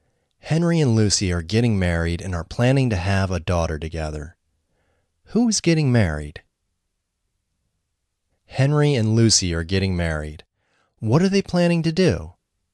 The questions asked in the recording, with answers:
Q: What are they planning to do?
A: They are planning to have a daughter together.